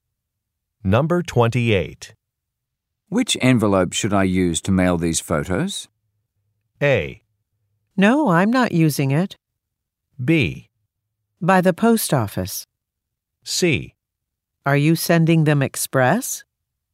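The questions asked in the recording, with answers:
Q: Which envelope should I use to mail these photos?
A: C: Are you sending them express?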